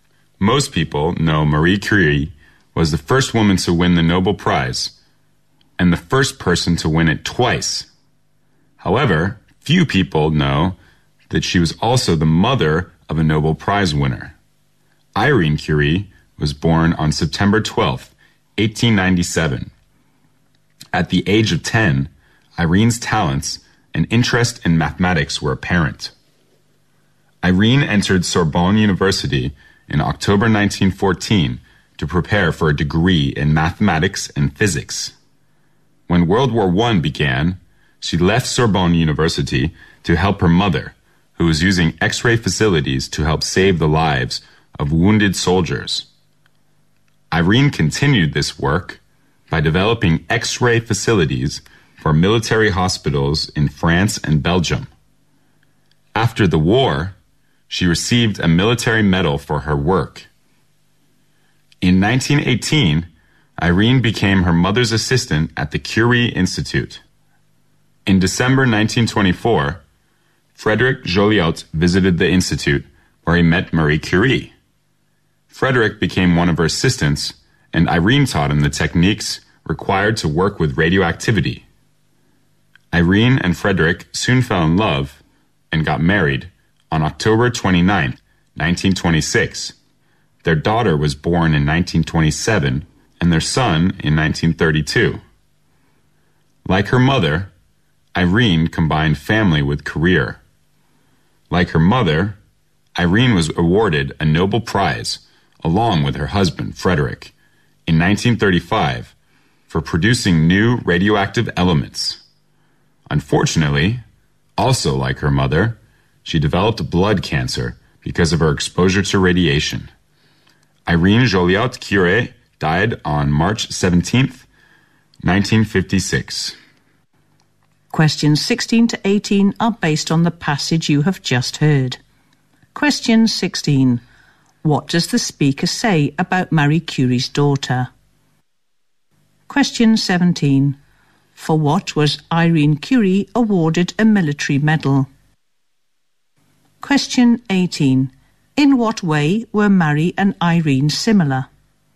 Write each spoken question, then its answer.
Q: What does the speaker say about Marie Curie's daughter?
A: She is also good at math and physics, and she also won Nobel Prize.

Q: For what was Irene Curie awarded a military medal?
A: She was awarded the military medal because she developed X-ray facilities to save wounded soldiers during World War I.

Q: In what way were Marie and Irene similar?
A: First of all, both of them won Nobel Prize.